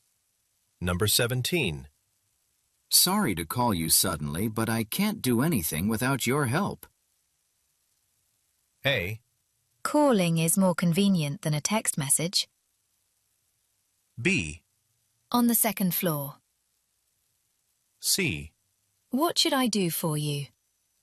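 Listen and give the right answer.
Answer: C: What should I do for you?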